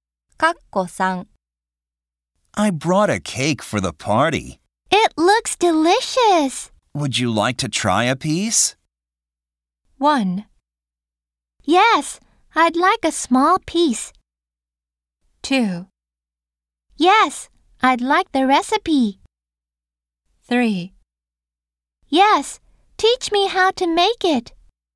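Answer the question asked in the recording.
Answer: 1: Yes, I'd like a small piece.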